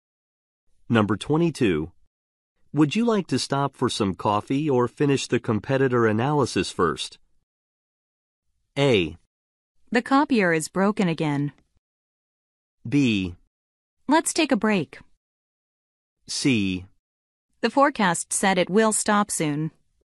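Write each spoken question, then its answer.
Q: Would you like to stop for some coffee or finish the competitor analysis first?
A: B: Let's take a break.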